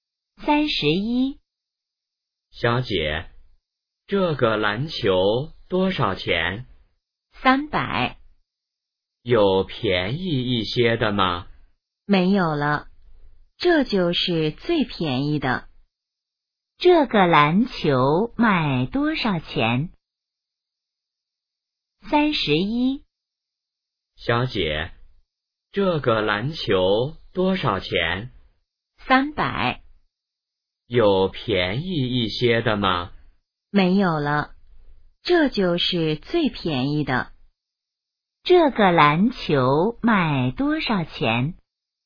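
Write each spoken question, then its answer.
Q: 这个篮球卖多少钱?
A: 300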